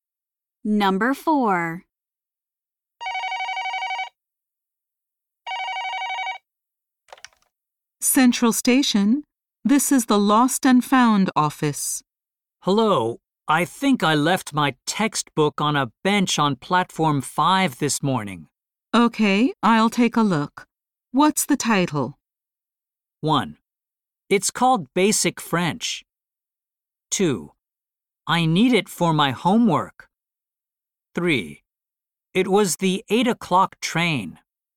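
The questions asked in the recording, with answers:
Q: Okay, I'll take a look. What's the title?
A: 1: It's called Basic French.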